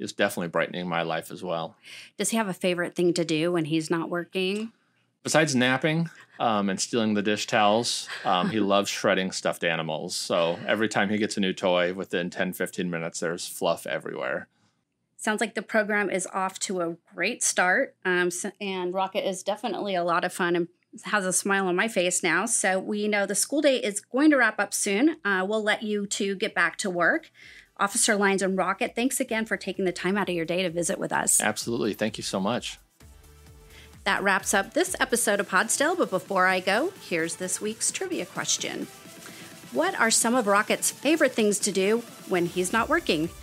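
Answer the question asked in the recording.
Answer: Napping, stealing dish towels and shredding stuffed animals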